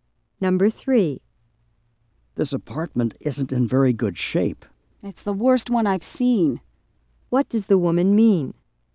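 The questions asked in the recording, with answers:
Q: What does the woman mean?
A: The apartment is in the worst condition of any she has seen.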